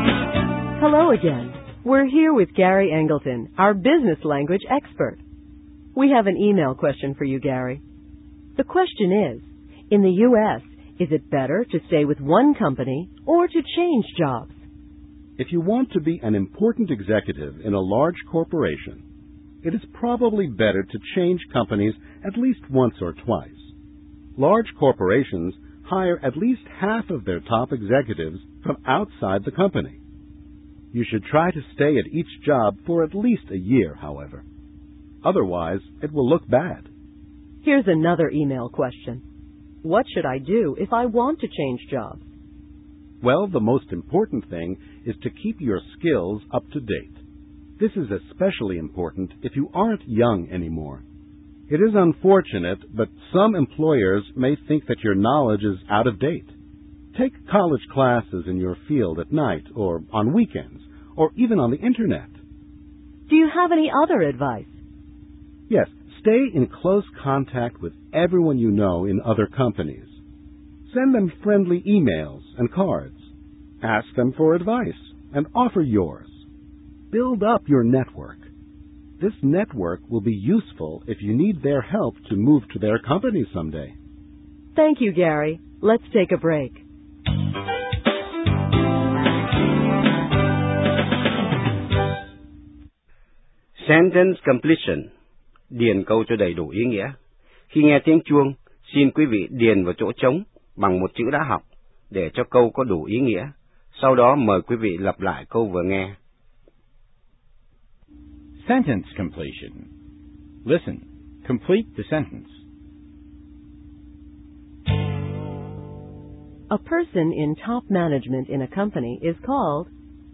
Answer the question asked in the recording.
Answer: an executive. The person is called an executive.